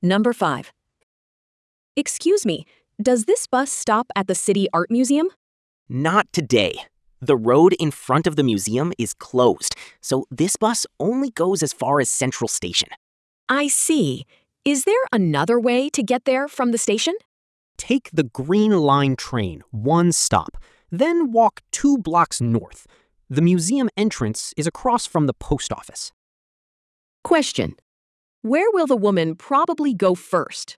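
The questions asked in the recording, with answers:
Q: where will the woman probably go first?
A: Central Station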